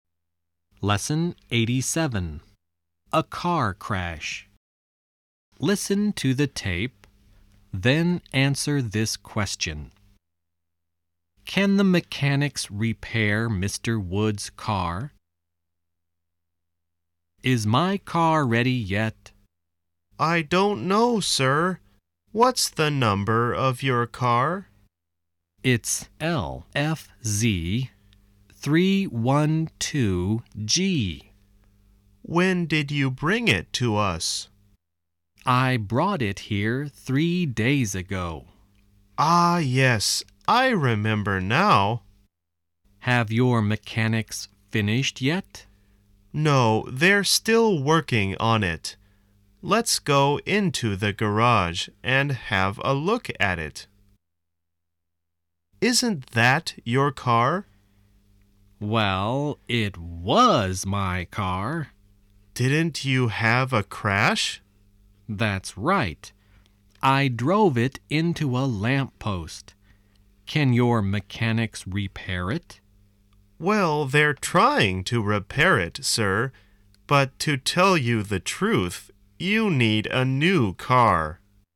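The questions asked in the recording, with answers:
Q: Can the mechanics repair Mr. Wood's car?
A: No, probably not; they're trying, but he needs a new car.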